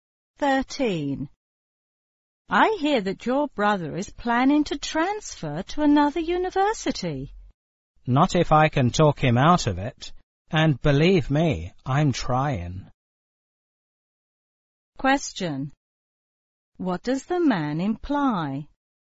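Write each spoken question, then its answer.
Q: What does the man imply?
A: He is trying to persuade his brother not to transfer.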